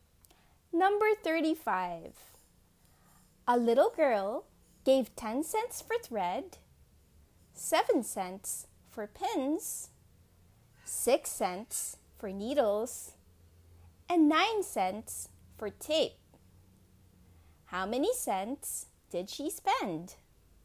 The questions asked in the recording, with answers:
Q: How many cents did she spend?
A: The answer is, she spent 32 cents.